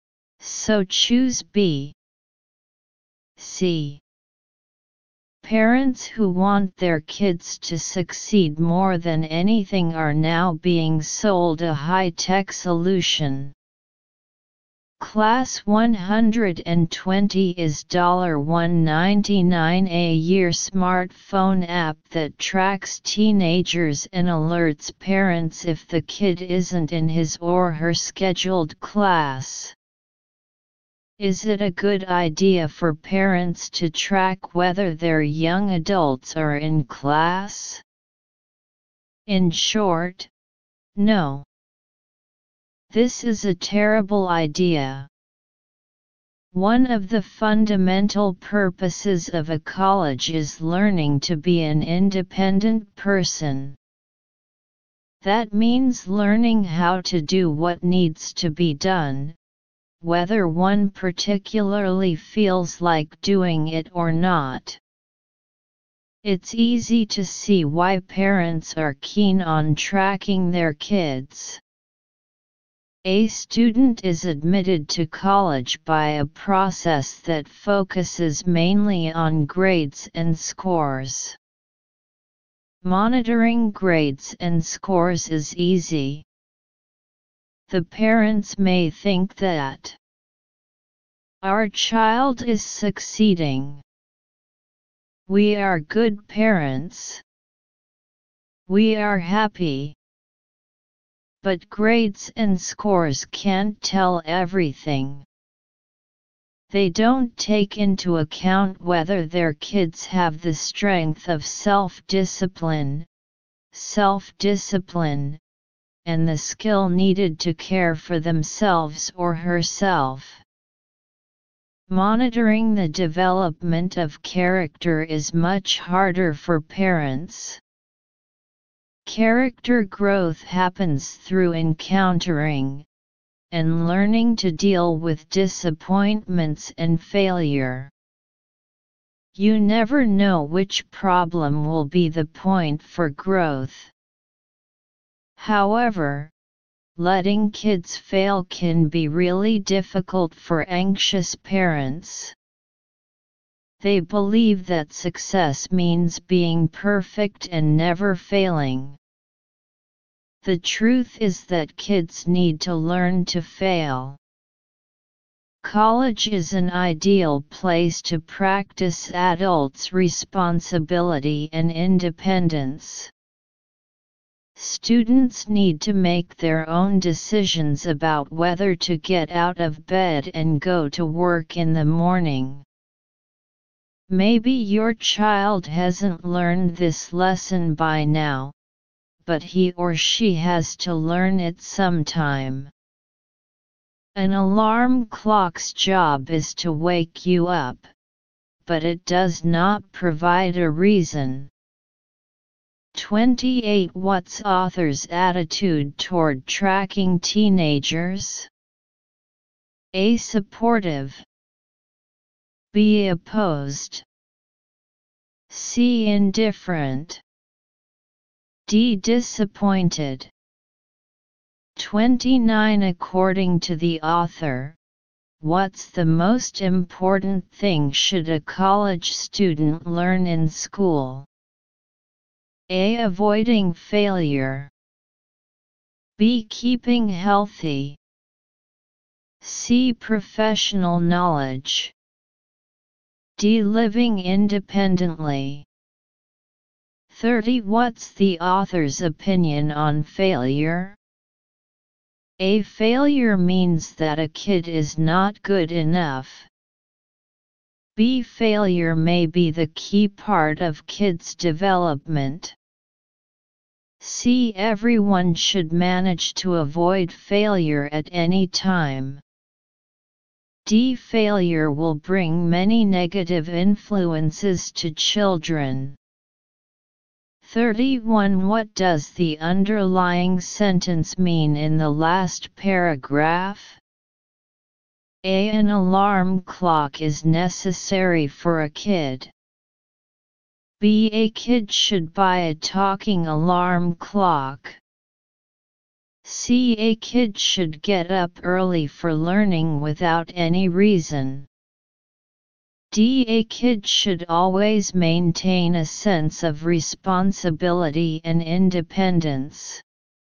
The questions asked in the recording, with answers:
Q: What's author's attitude toward tracking teenagers?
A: Answer 28. B.

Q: According to the author, what's the most important thing should a college student learn in school?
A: 29. D.

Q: What's the author's opinion on failure?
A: 30. B.

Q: What does the underlying sentence mean in the last paragraph?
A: 31. D.